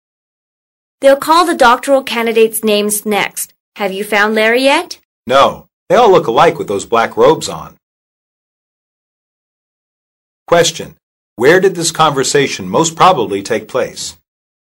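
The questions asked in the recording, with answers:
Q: Where did this conversation most probably take place?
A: At a graduation ceremony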